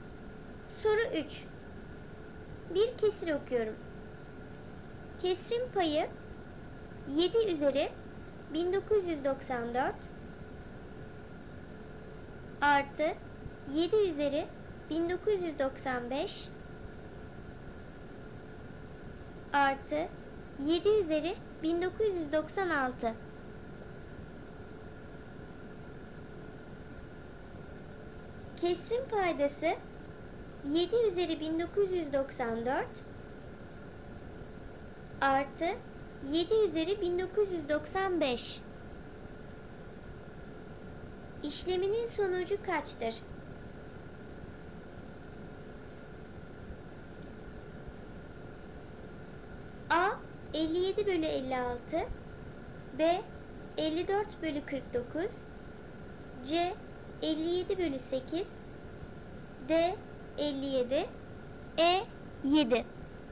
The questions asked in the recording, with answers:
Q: İşleminin sonucu kaçtır?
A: Doğru cevap C 57 bölü 8.